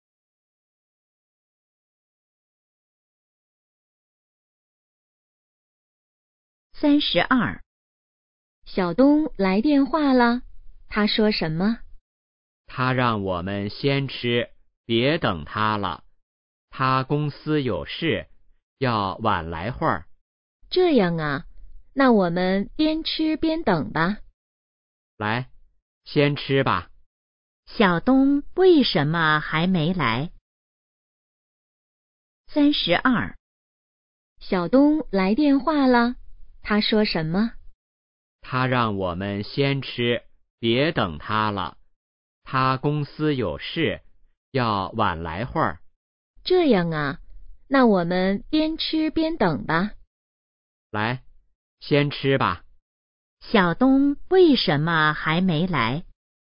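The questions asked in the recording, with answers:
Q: 小东为什么还没来?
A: 公司有事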